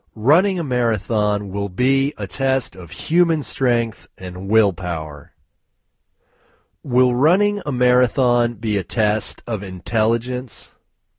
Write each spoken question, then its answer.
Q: Will running a marathon be a test of intelligence?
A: No, running a marathon won't be a test of intelligence.